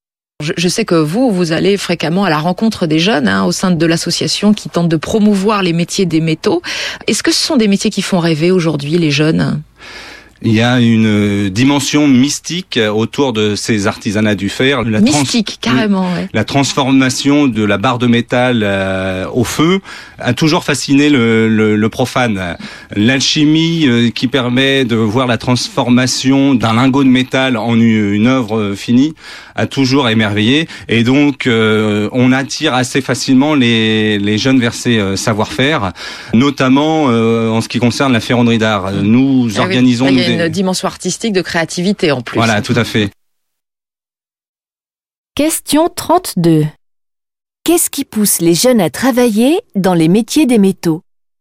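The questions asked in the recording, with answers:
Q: Qu'est-ce qui pousse les jeunes à travailler dans les métiers des métaux ?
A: La fascination pour la transformation du métal au feu, une dimension mystique et artistique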